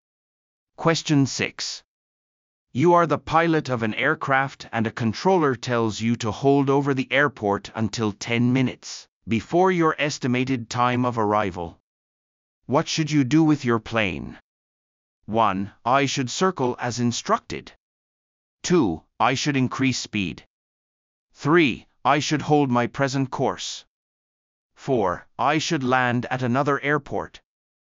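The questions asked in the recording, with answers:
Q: What should you do with your plane?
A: 1: I should circle as instructed.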